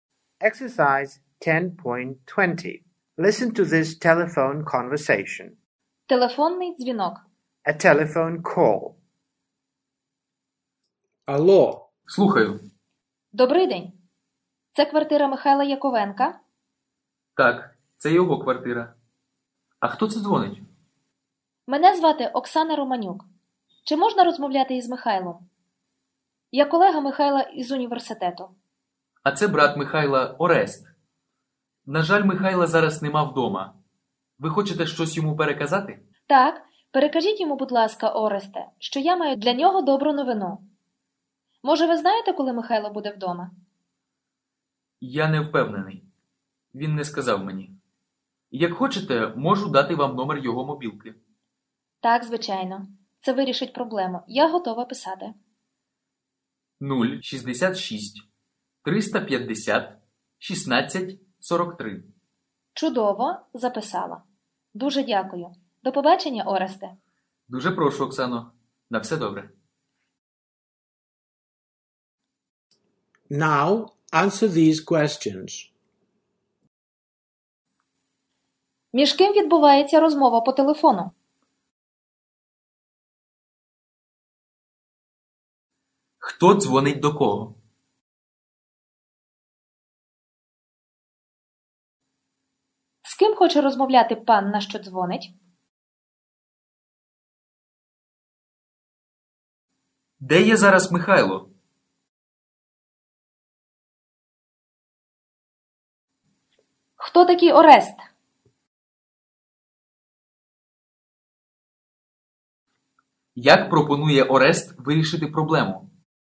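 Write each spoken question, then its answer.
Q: Між ким відбувається розмова по телефону?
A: Між Оксаною Романюк і Орестом, братом Михайла

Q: Хто дзвонить до кого?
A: Оксана Романюк дзвонить до Михайла Яковенка

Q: Де є зараз Михайло?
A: Його нема вдома

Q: Хто такий Орест?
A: Брат Михайла

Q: Як пропонує Орест вирішити проблему?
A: Дати номер мобілки Михайла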